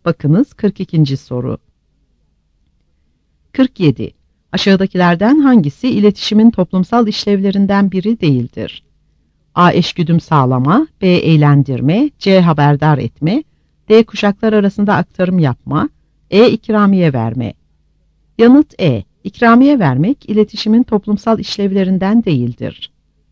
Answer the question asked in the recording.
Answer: Yanıt E.